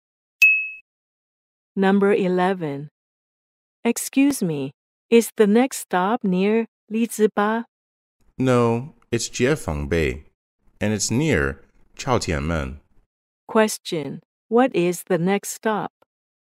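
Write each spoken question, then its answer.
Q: Question, what is the next stop?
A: Jiefangbei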